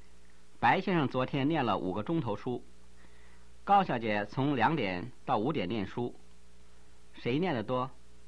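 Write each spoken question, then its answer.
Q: 谁念得多?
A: 白先生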